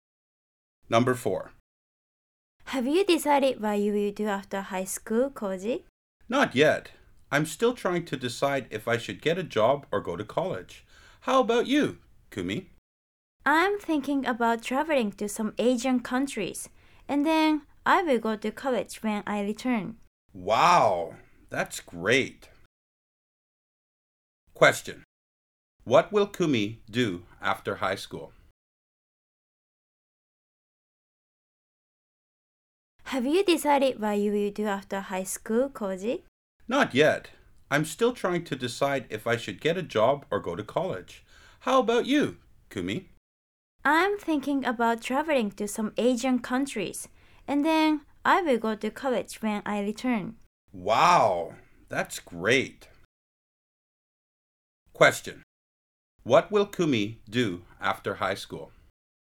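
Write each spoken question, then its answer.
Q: What will Kumi do after high school?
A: Travel to some Asian countries, then go to college.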